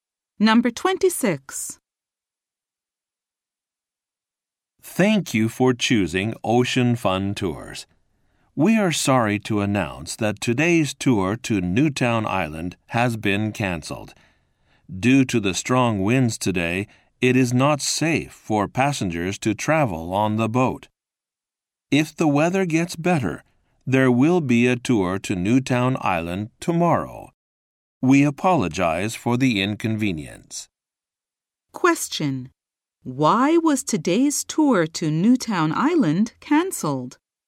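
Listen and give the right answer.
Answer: Because of strong winds.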